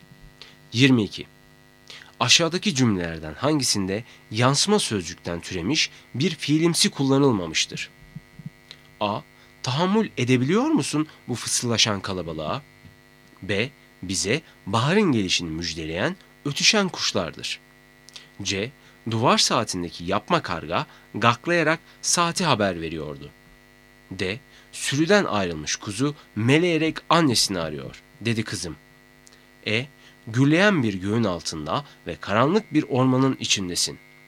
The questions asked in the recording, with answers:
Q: Aşağıdaki cümlelerden hangisinde yansıma sözcükten türemiş bir fiilimsi kullanılmamıştır?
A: Doğru cevap B. Bize baharın gelişini müjdeleyen ötüşen kuşlardır.